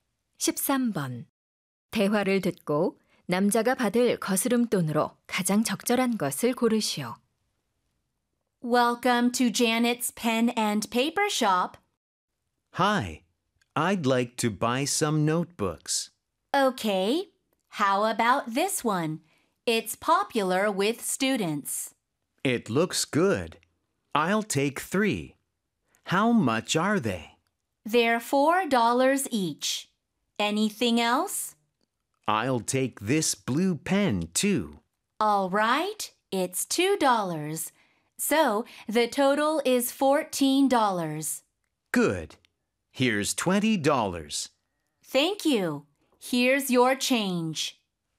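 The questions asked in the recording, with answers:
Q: 대화를 듣고 남자가 받을 거스름돈으로 가장 적절한 것을 고르시오.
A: 6달러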